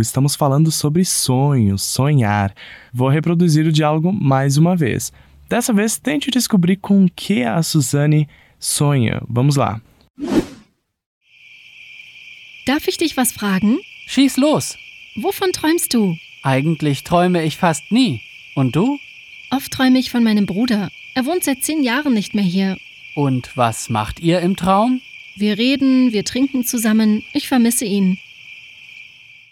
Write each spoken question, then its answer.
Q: Dessa vez, tente descobrir com que a Suzane sonha.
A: ela responde dizendo que ela sonha com frequência com o irmão dela.